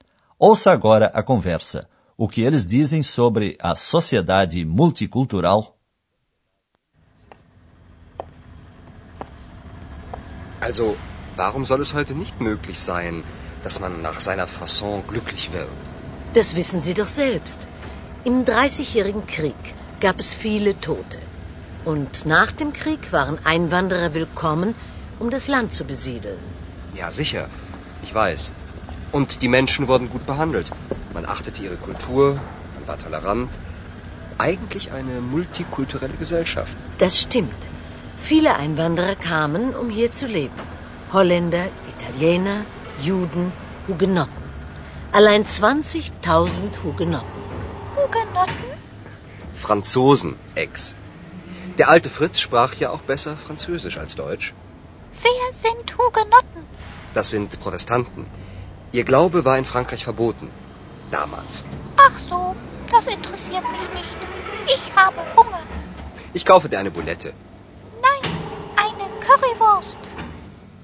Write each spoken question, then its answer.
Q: O que eles dizem sobre a sociedade multicultural?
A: Andreas recorda saudoso os tempos em que uma sociedade multicultural era menos problemática do que hoje, e as pessoas eram bem tratadas.